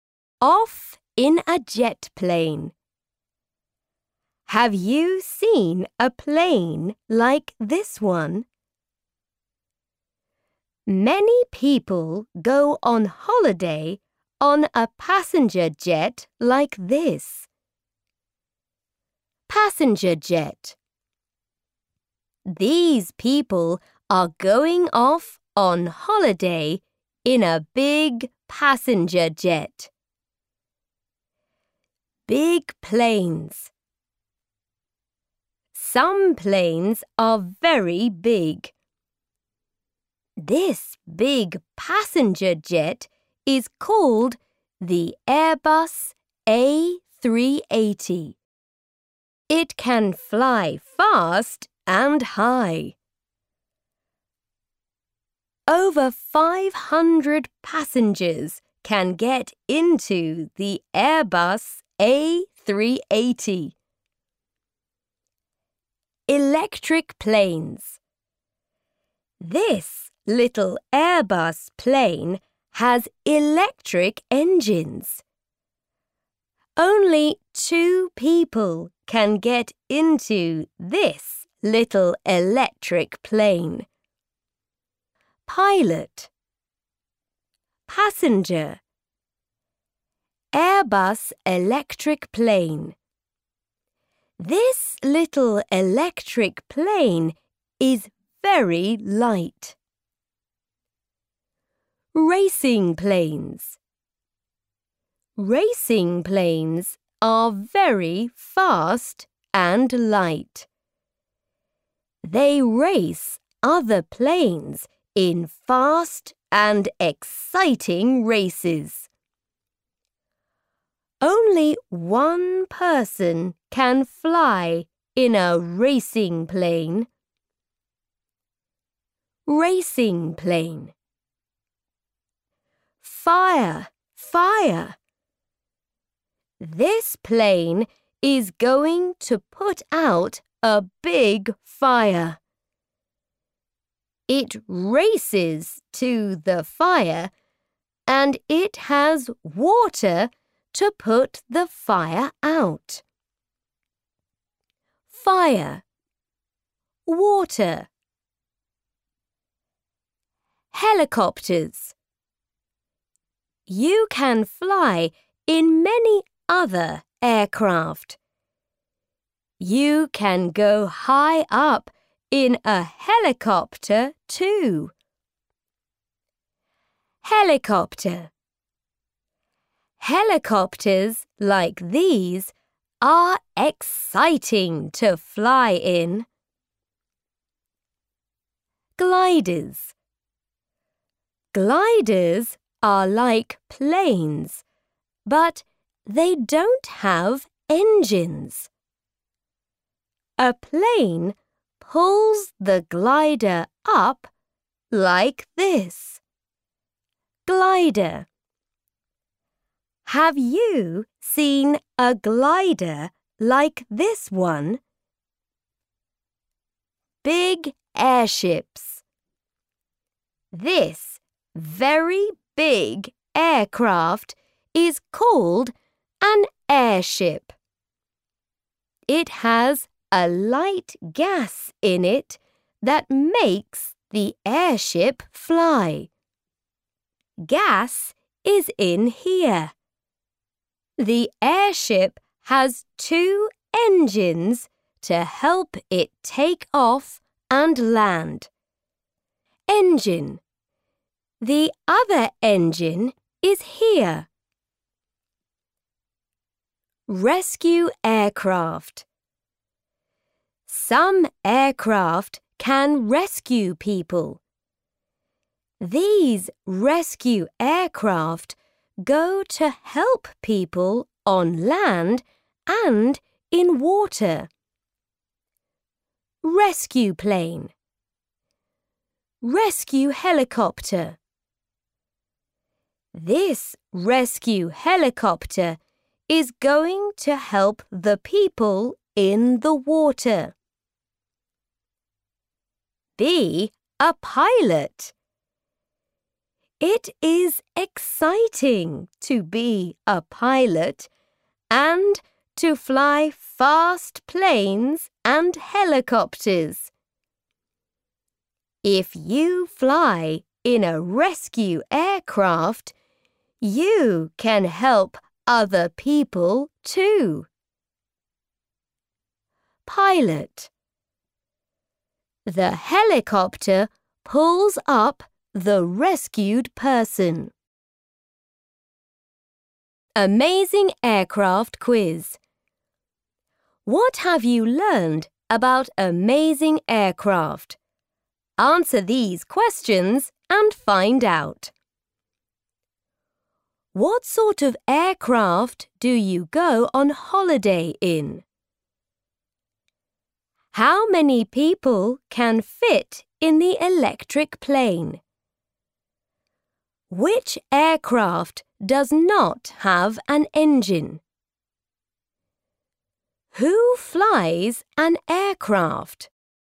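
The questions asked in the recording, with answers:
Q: What sort of aircraft do you go on holiday in?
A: A passenger jet

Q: Which aircraft does not have an engine?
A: A glider

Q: Who flies an aircraft?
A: A pilot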